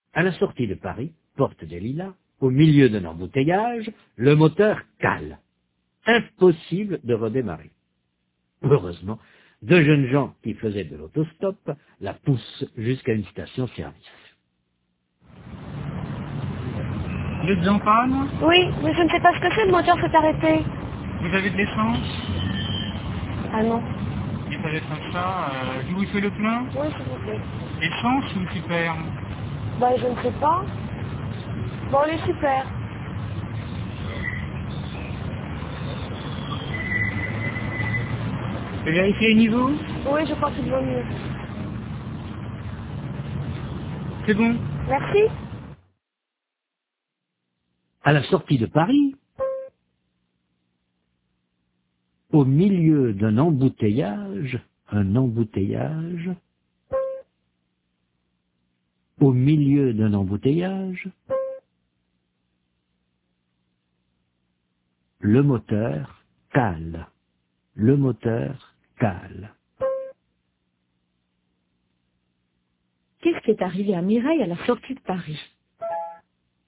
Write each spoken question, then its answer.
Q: Qu'est-ce qui est arrivé à Mireille à la sortie de Paris ?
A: Le moteur a calé.